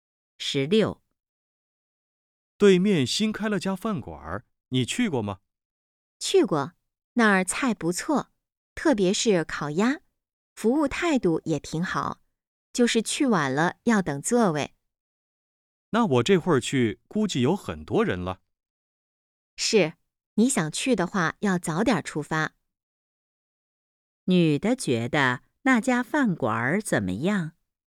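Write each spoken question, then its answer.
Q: 女的觉得那家饭馆怎么样?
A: 菜不错,服务态度好,但去晚了要等座位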